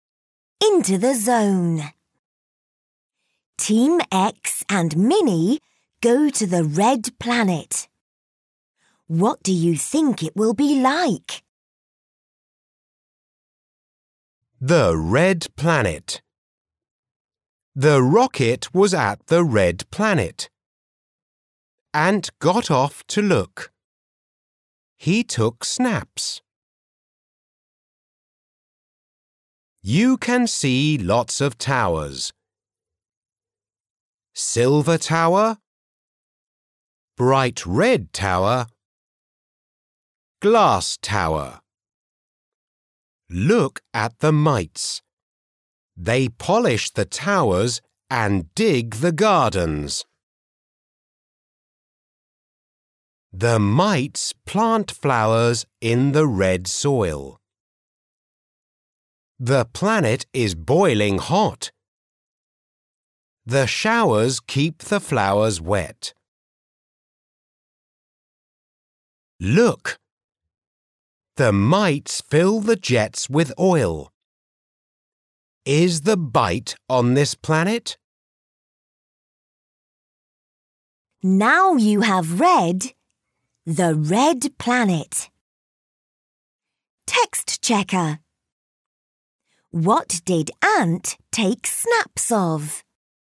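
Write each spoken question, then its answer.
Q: What did Ant take snaps of?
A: The towers on the Red Planet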